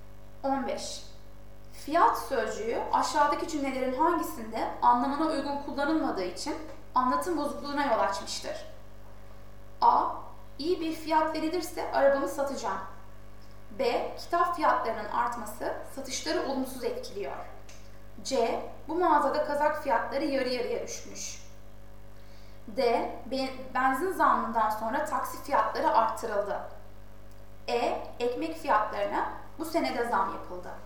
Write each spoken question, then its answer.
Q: Fiyat sözcüğü aşağıdaki cümlelerin hangisinde anlamına uygun kullanılmadığı için anlatım bozukluğuna yol açmıştır?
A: Doğru yanıt D.